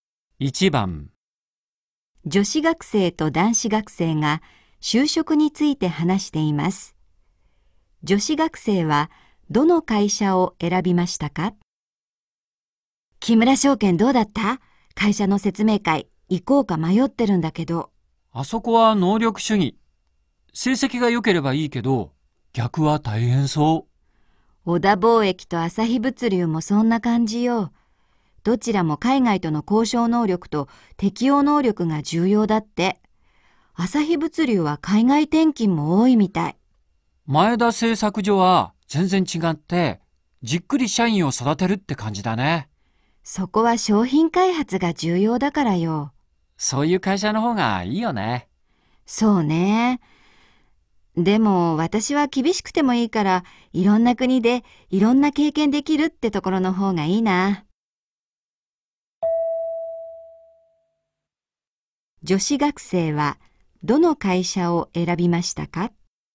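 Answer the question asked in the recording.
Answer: 朝日物流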